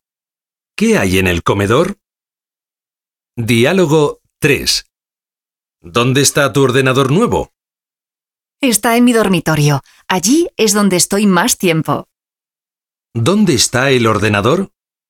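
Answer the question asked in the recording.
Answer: En el dormitorio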